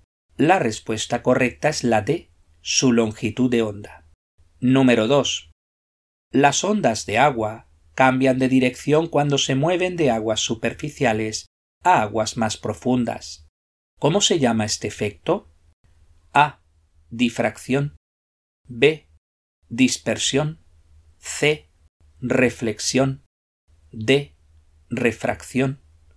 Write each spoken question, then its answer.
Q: ¿Cómo se llama este efecto?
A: La respuesta correcta es la D.